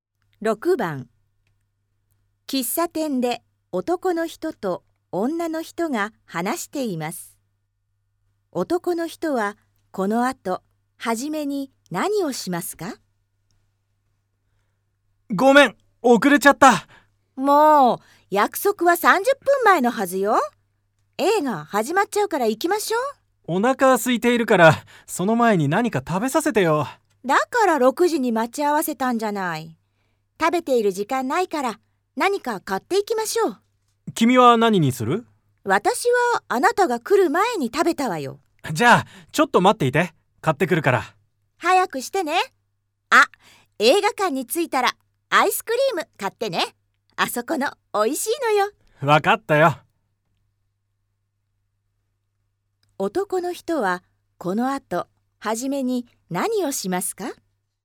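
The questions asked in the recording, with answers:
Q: 男の人はこのあと初めに何をしますか?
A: 食べ物を買いに行く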